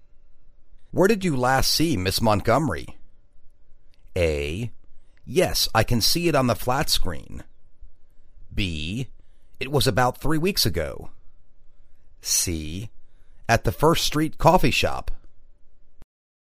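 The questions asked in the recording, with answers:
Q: Where did you last see Miss Montgomery?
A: C: At the First Street Coffee Shop.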